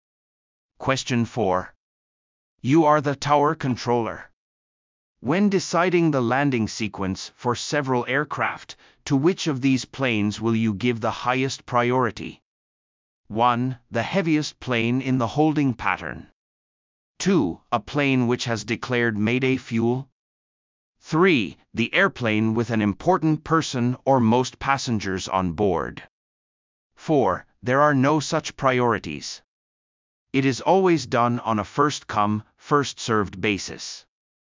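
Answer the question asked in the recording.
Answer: 2: A plane which has declared mayday fuel.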